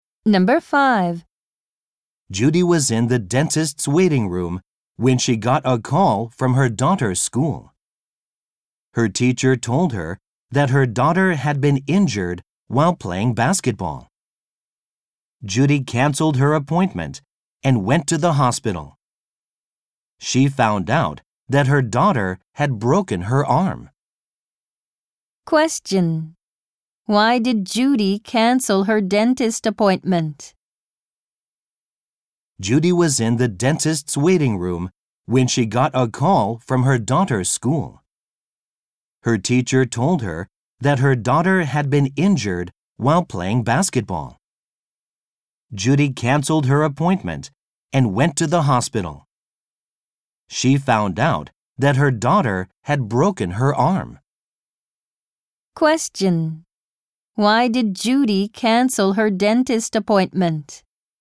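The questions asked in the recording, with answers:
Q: Why did Judy cancel her dentist appointment?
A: Her daughter was injured playing basketball (broke her arm).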